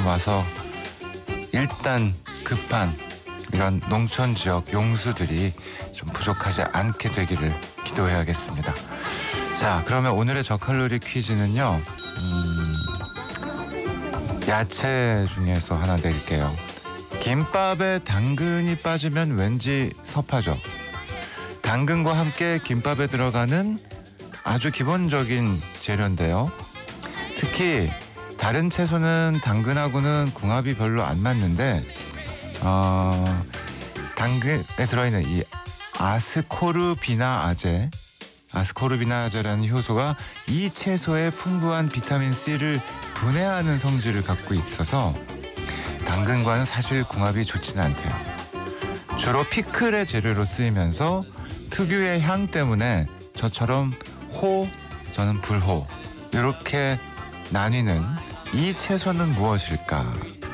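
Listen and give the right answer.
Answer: 오이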